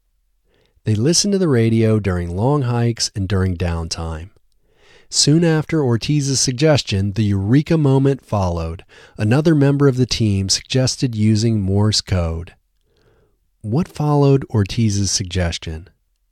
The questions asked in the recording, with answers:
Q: What followed Ortiz's suggestion?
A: The Eureka moment followed Ortiz's suggestion.